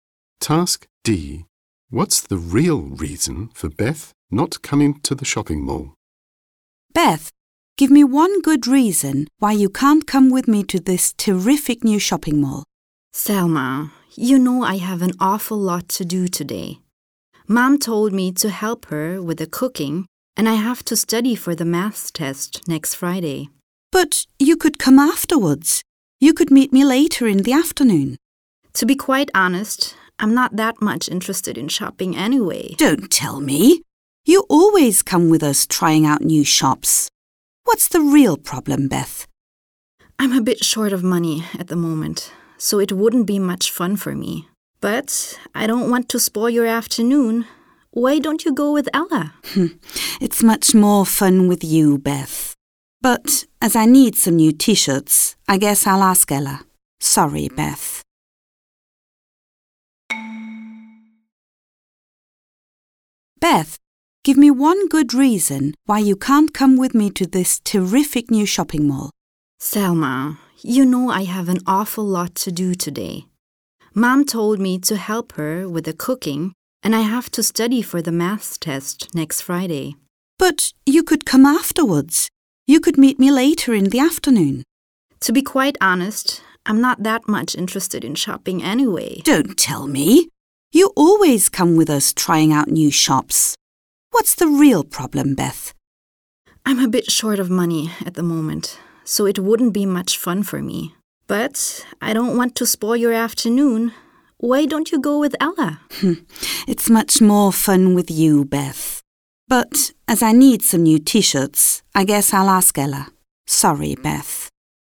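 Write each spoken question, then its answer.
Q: What's the real reason for Beth not coming to the shopping mall?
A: She is short of money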